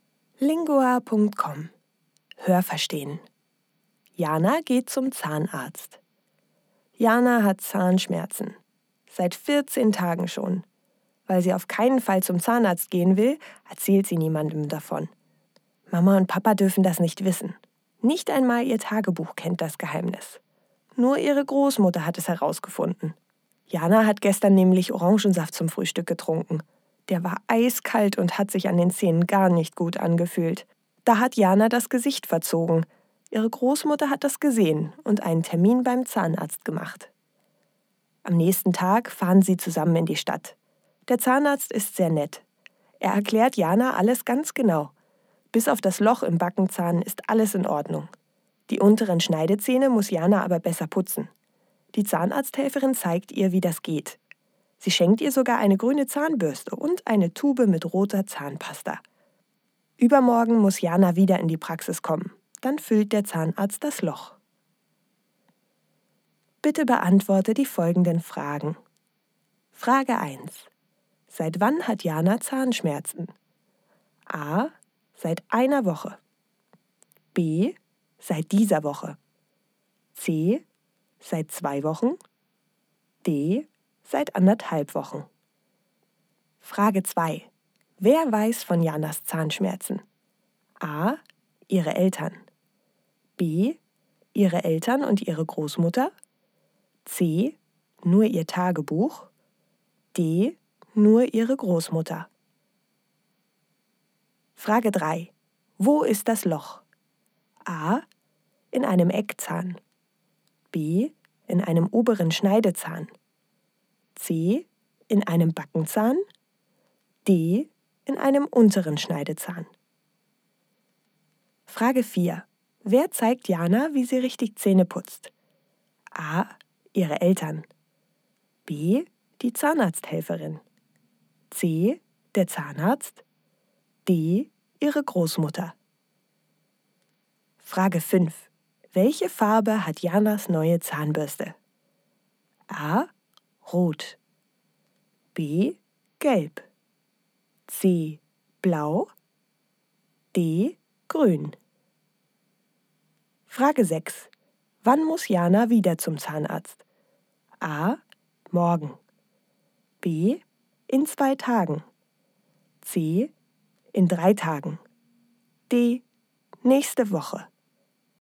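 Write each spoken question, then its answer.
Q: Seit wann hat Jana Zahnschmerzen?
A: C: Seit zwei Wochen.

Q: Wer weiß von Janas Zahnschmerzen?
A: D: Nur ihre Großmutter.

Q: Wo ist das Loch?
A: C: In einem Backenzahn.

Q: Wer zeigt Jana, wie sie richtig Zähne putzt?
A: B: Die Zahnarzthelferin.

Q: Welche Farbe hat Janas neue Zahnbürste?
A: D: Grün.

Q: Wann muss Jana wieder zum Zahnarzt?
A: B: In 2 Tagen.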